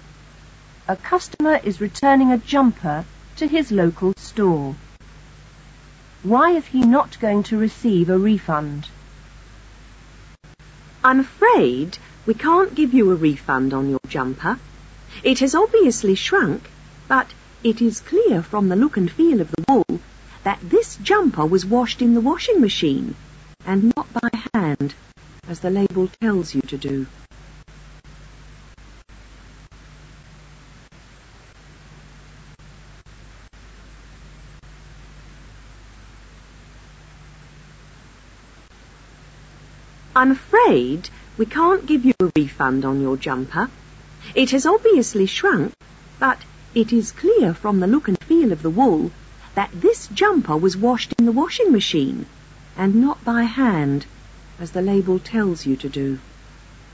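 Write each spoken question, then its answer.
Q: Why is he not going to receive a refund?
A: He washed the jumper in the washing machine instead of by hand, as the label says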